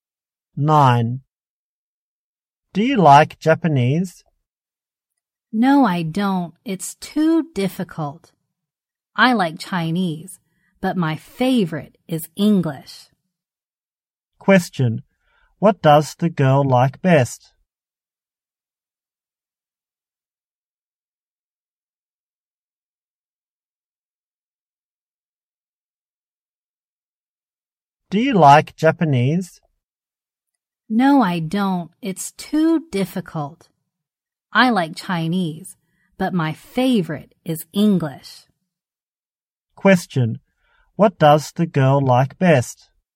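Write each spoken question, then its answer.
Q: Question. What does the girl like best?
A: English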